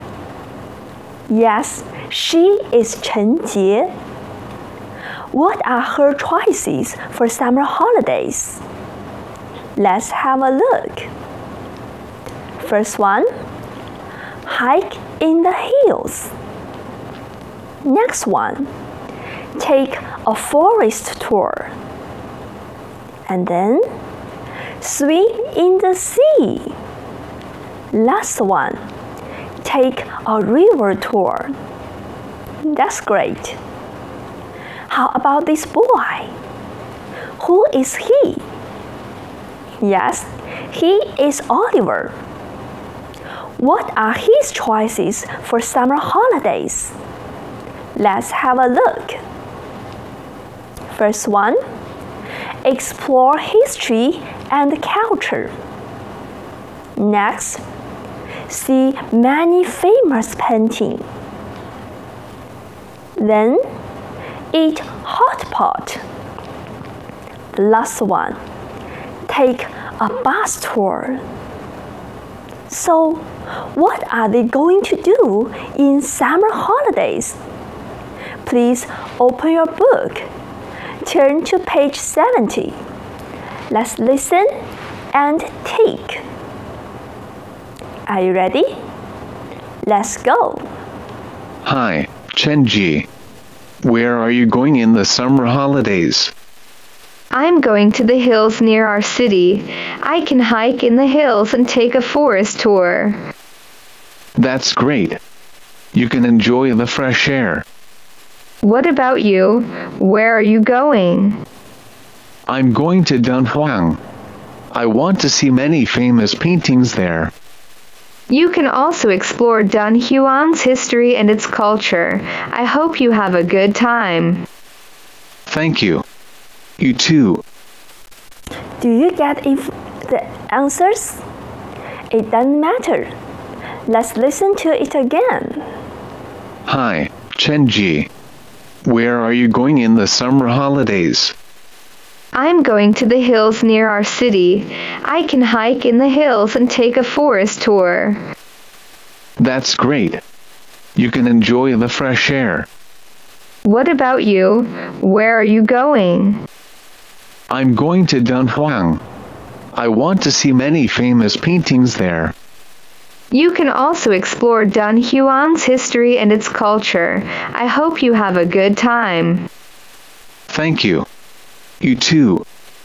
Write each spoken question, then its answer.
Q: So, what are they going to do in summer holidays?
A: 陈杰 is going to hike in the hills and take a forest tour. How about Oliver? Yes, he is going to explore history and culture and see many famous paintings.